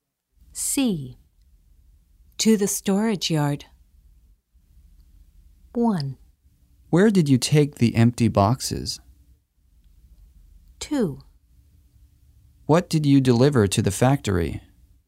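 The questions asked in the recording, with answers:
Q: To the storage yard.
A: 1: Where did you take the empty boxes?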